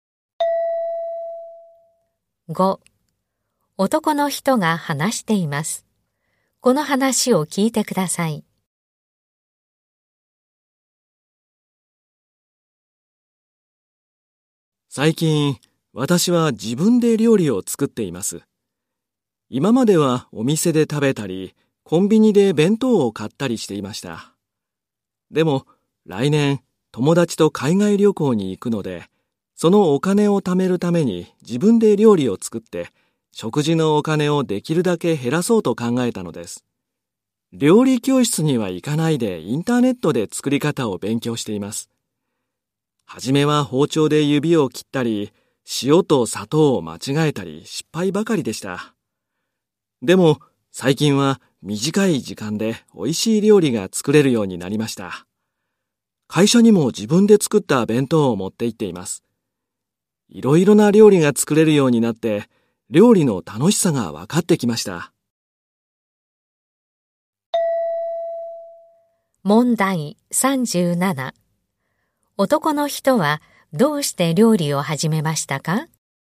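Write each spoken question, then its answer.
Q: 男の人はどうして料理を始めましたか?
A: 海外旅行のお金を貯めるため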